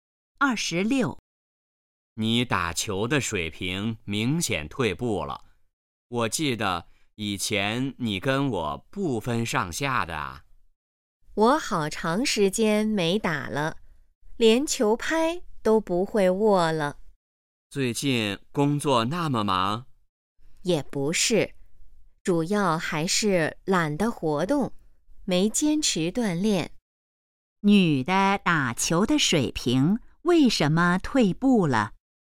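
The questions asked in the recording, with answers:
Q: 女的打球的水平为什么退步了?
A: 懒得活动,没坚持锻炼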